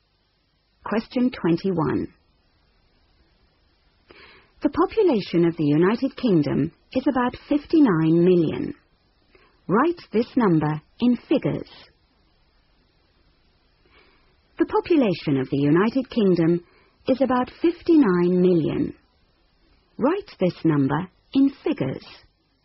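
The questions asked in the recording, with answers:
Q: Write this number in figures.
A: 59000000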